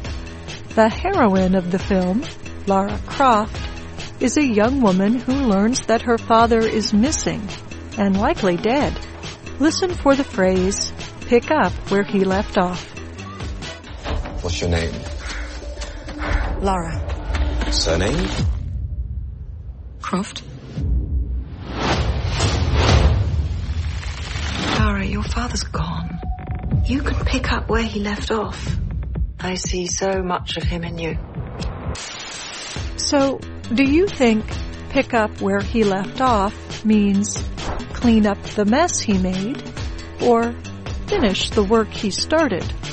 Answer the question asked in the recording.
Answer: Pick up where he left off means finish the work he started.